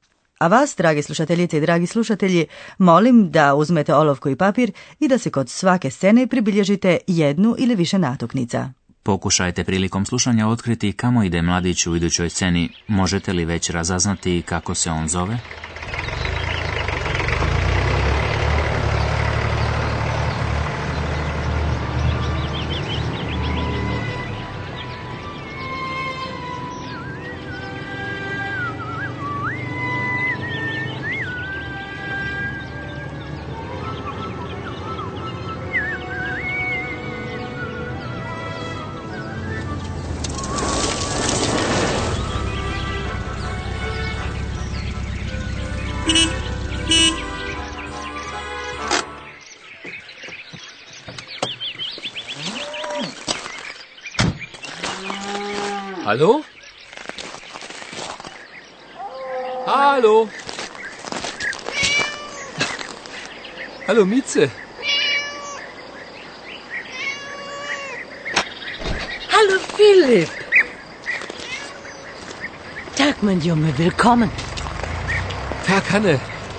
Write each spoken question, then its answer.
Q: Možete li već razaznati kako se on zove?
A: Možda ste već uspjeli i razaznati da se mladić zove Filip